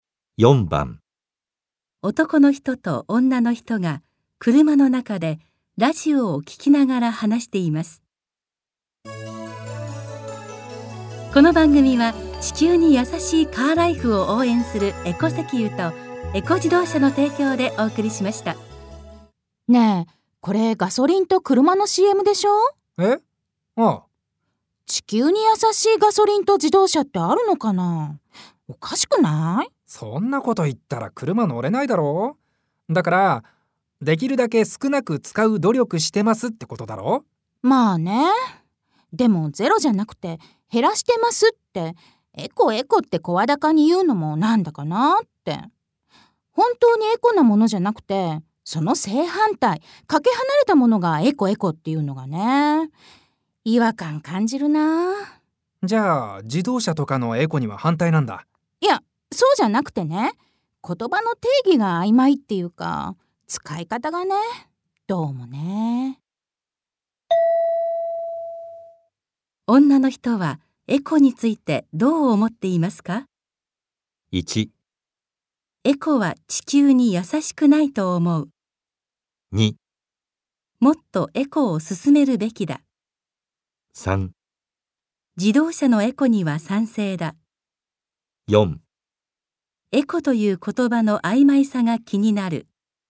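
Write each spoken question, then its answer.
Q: 女の人はエコについてどう思っていますか?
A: 4: エコという言葉の曖昧さが気になる。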